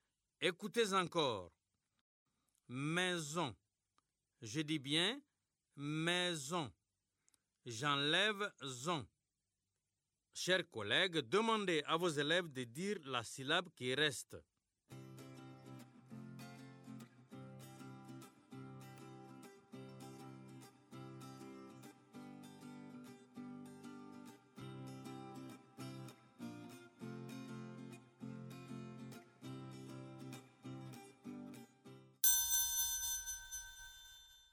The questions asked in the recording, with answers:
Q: J'enlève zon. Chers collègues, demandez à vos élèves de dire la syllabe qui reste.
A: Il reste mais.